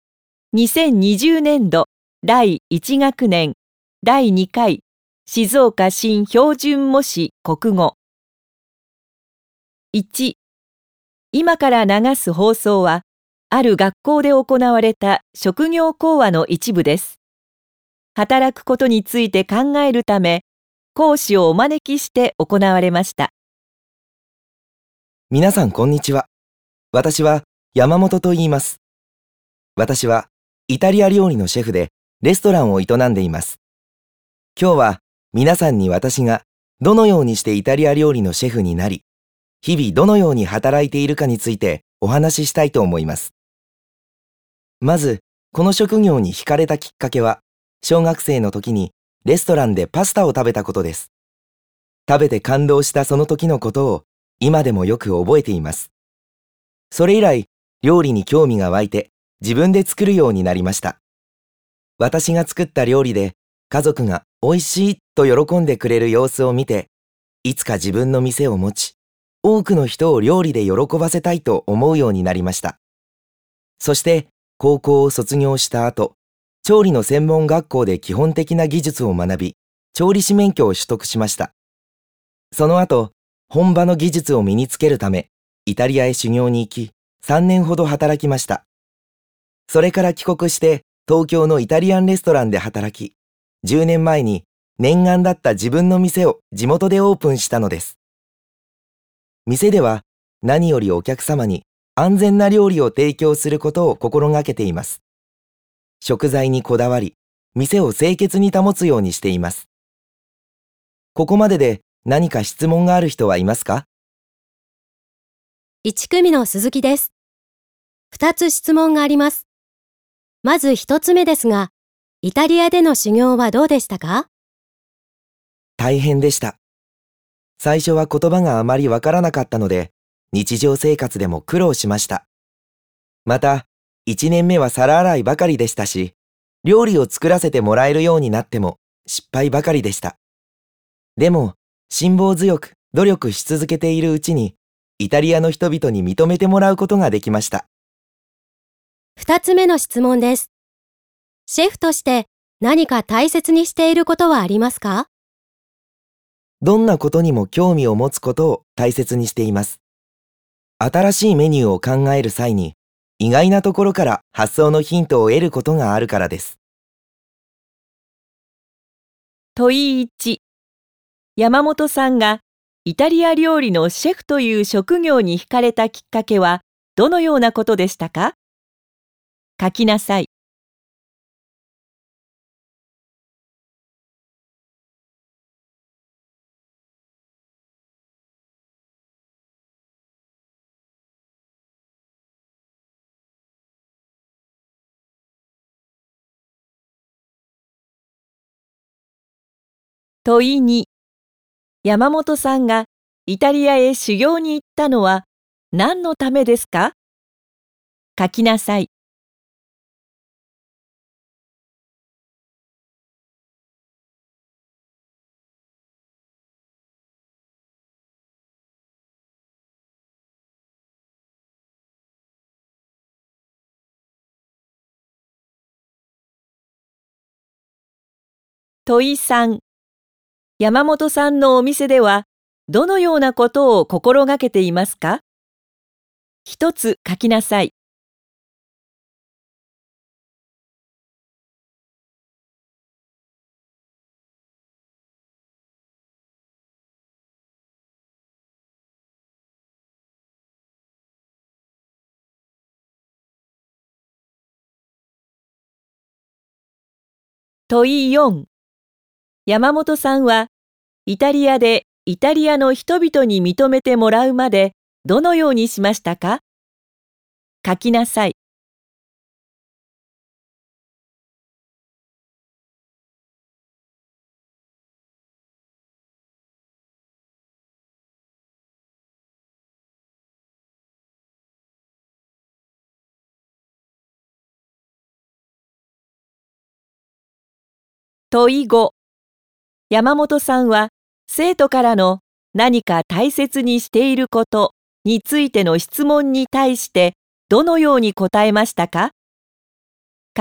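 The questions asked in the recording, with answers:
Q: 山本さんがイタリア料理のシェフという職業に惹かれたきっかけはどのようなことでしたか?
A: 小学生の時にレストランでパスタを食べて感動したこと

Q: 山本さんがイタリアへ修行に行ったのは何のためですか?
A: 本場の技術を身につけるため

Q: 山本さんのお店では、どのようなことを心がけていますか?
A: お客様に安全な料理を提供すること(食材にこだわり、店を清潔に保つこと)

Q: 山本さんはイタリアでイタリアの人々に認めてもらうまでどのようにしましたか?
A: 辛抱強く努力し続けた

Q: 山本さんは生徒からの何か大切にしていることについての質問に対してどのように答えましたか?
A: どんなことにも興味を持つことを大切にしている(意外なところから新メニューの発想のヒントを得ることがあるから)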